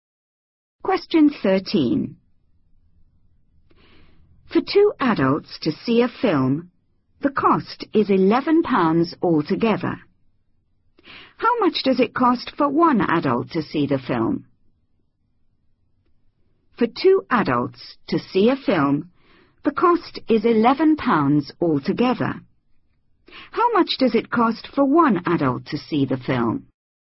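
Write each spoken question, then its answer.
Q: How much does it cost for one adult to see the film?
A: £5.50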